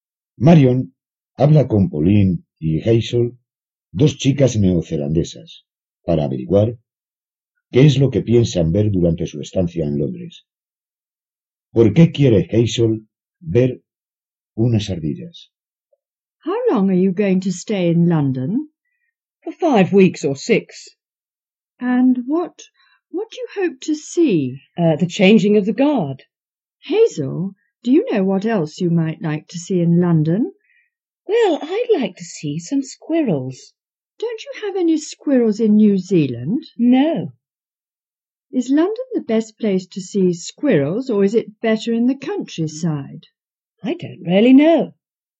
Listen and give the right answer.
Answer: Hazel quiere ver unas ardillas porque en Nueva Zelanda no hay ardillas.